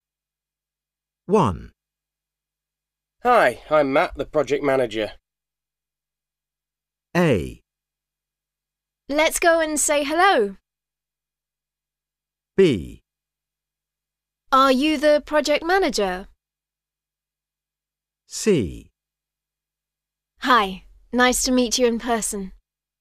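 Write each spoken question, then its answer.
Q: Hi, I'm Matt, the project manager.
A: C: Hi, nice to meet you in person.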